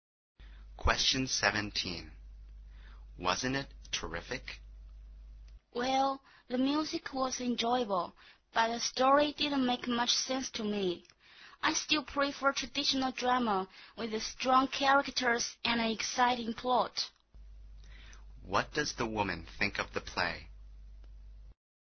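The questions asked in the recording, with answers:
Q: What does the woman think of the play?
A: The music was enjoyable but the story didn't make much sense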